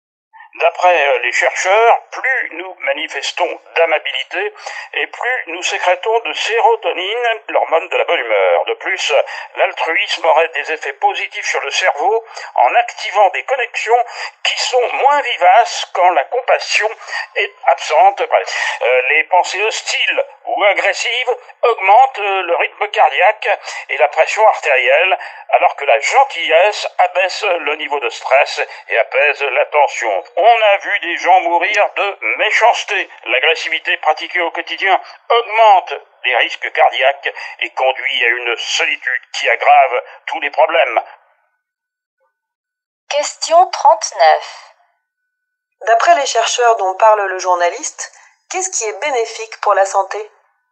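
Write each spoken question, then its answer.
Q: D'après les chercheurs dont parle le journaliste, qu'est-ce qui est bénéfique pour la santé ?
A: La gentillesse (l'amabilité, l'altruisme)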